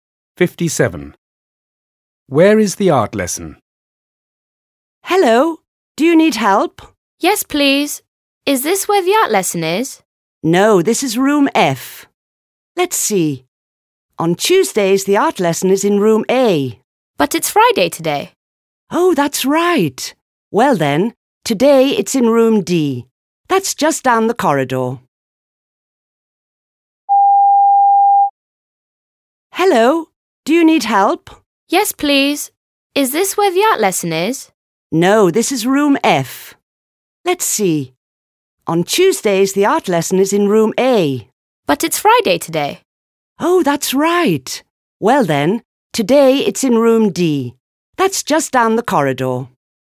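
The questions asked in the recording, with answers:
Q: Where is the art lesson?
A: Room D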